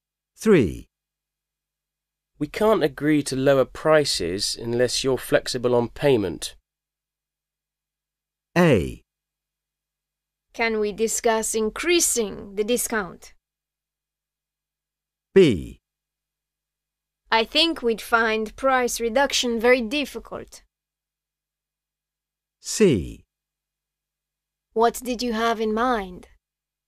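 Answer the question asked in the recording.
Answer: C: What did you have in mind?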